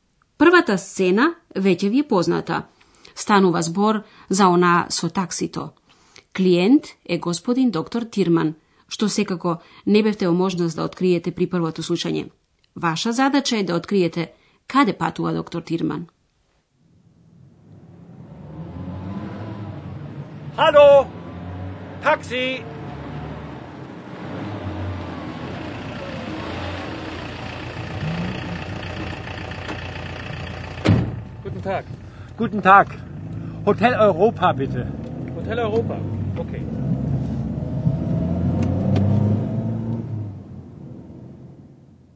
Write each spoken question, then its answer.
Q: Ваша задача е да откриете каде патува доктор Тирман.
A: Доктор Тирман му кажа на такси возачот дека сака да биде префрлен во хотел Европа.